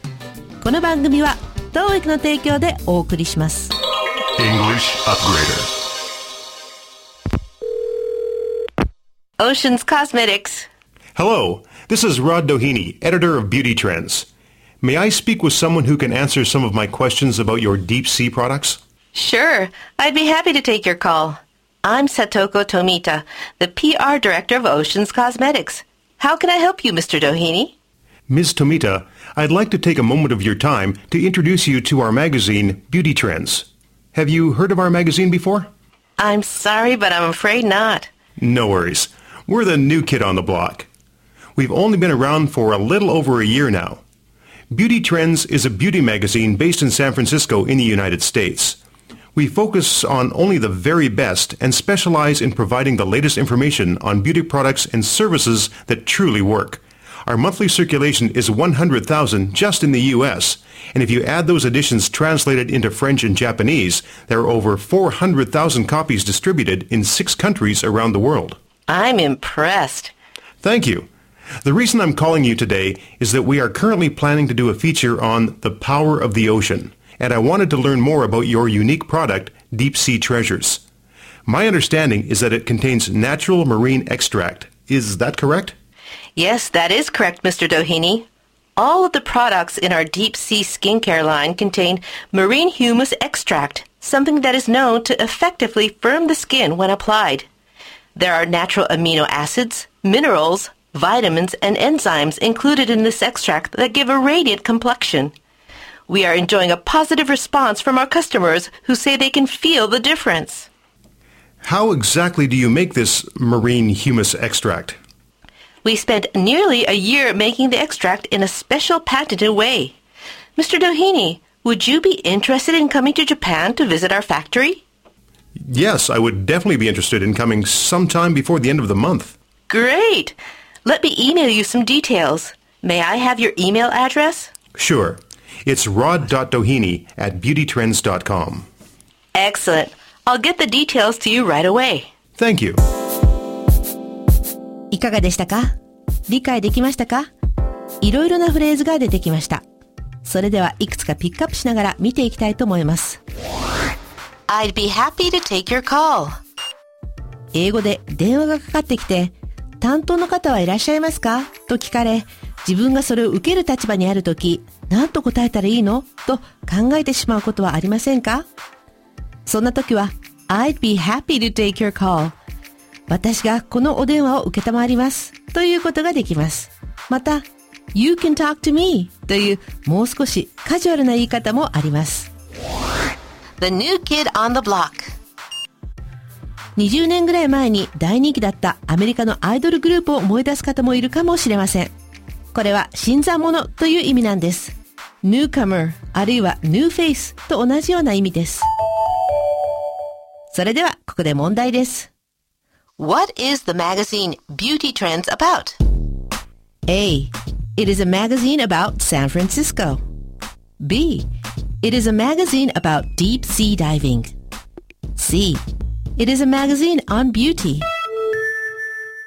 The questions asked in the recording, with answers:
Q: What is the magazine Beauty Trends about?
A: 正解は C、 美容に関する雑誌です。